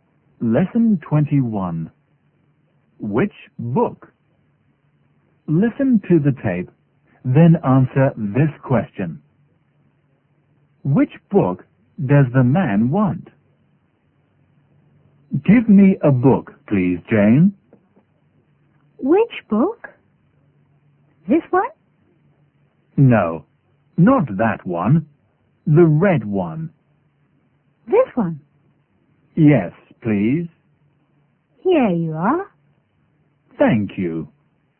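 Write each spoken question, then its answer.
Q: Which book does the man want?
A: The red one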